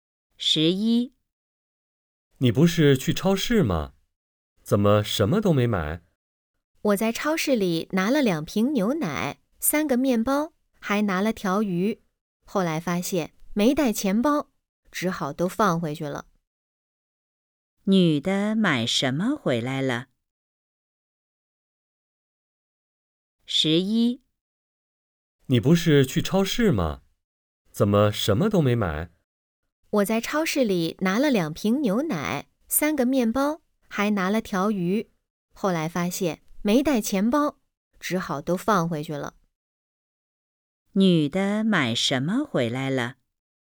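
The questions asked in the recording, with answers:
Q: 女的买什么回来了?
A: 什么都没买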